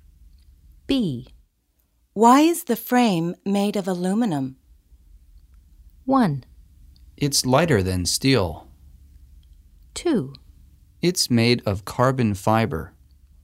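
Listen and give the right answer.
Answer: 1: It's lighter than steel.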